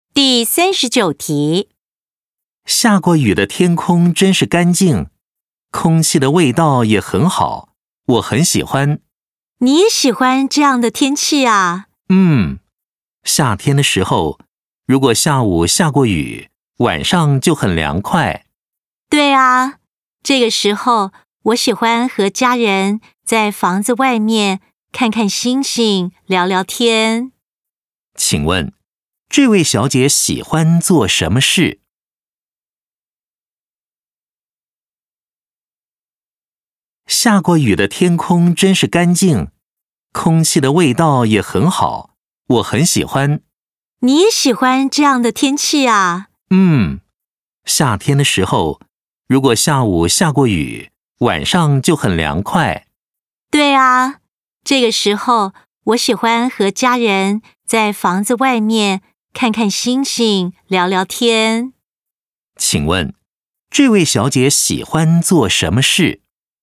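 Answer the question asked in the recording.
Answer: 下过雨后和家人在房子外面看星星、聊天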